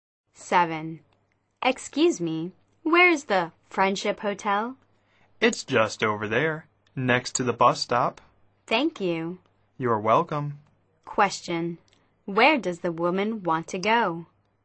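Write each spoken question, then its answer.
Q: Question. Where does the woman want to go?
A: The Friendship Hotel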